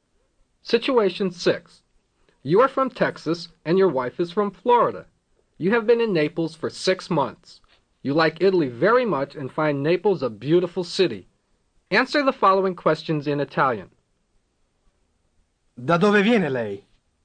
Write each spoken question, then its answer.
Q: Da dove viene lei?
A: Dal Texas.